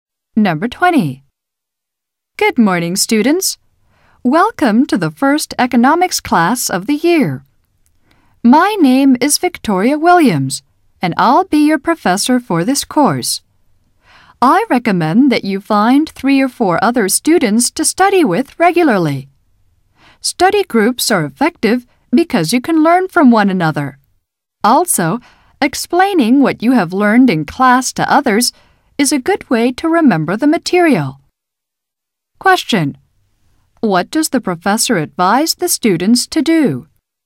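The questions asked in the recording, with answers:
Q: What does the professor advise the students to do?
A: Find 3 or 4 other students to study with regularly (form a study group).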